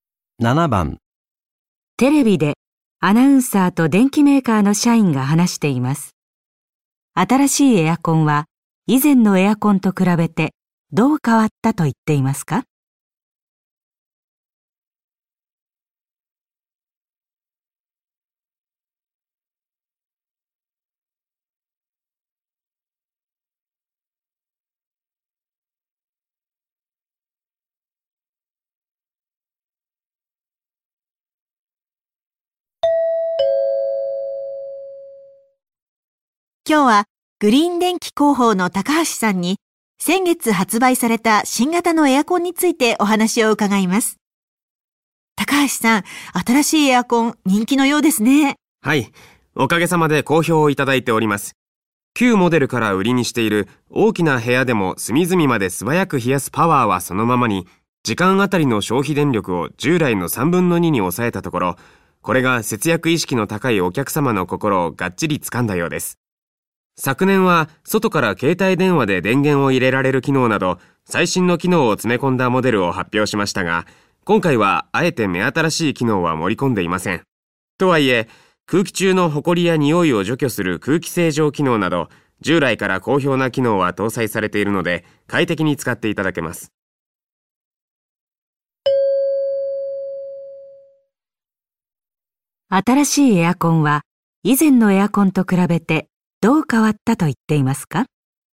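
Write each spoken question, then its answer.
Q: 新しいエアコンは、以前のエアコンと比べてどう変わったと言っていますか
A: 消費電力が従来の3分の2に抑えられた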